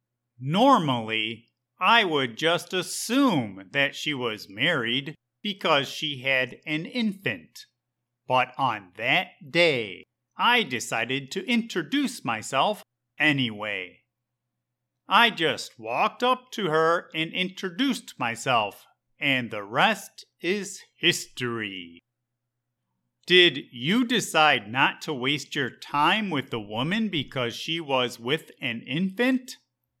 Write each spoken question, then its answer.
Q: Did you decide not to waste your time with the woman because she was with an infant?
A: No. That would have been my normal response.